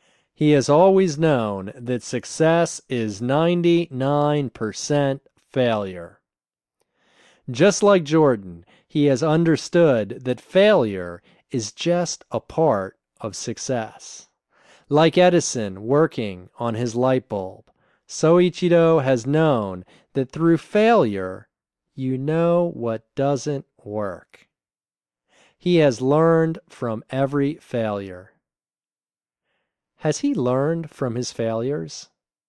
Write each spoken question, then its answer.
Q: Has he learned from his failures?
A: Yes, he has learned from every failure.